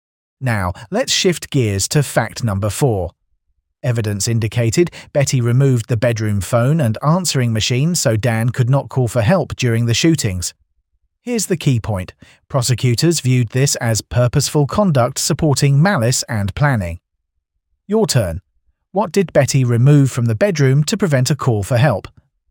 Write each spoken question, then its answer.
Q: What did Betty remove from the bedroom to prevent a call for help?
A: The phone and answering machine.